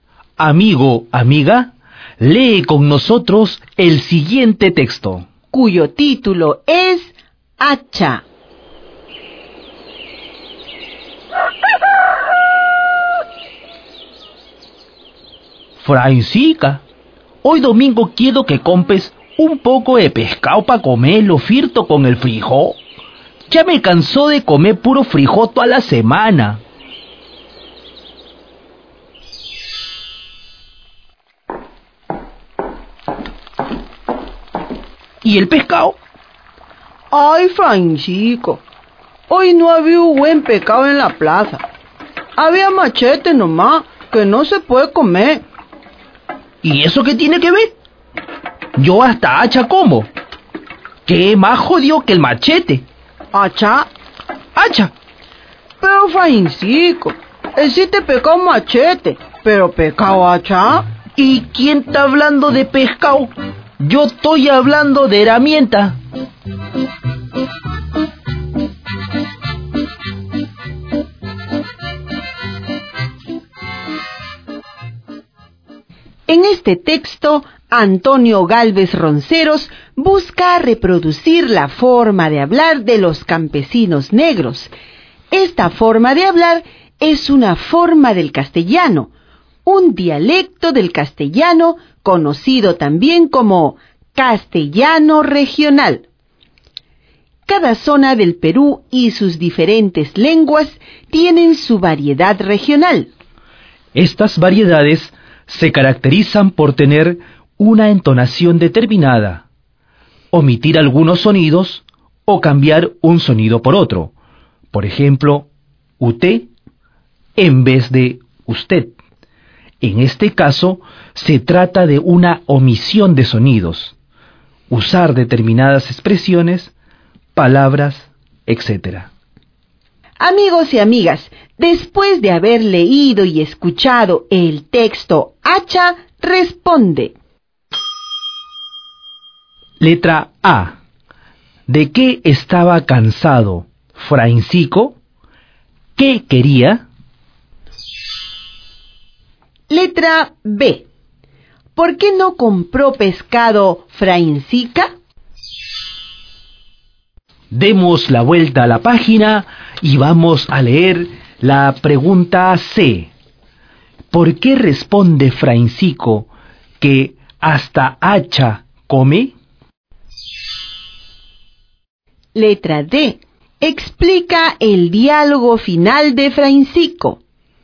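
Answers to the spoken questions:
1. De comer puro frijol toda la semana
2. Comer pescado frito con el frijol
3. Porque no había buen pescado en la plaza, solo machete
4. Porque él hablaba del machete como herramienta, no como pescado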